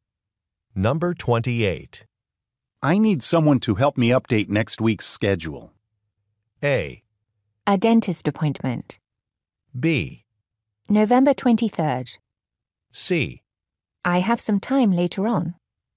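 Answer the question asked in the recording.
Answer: C: I have some time later on.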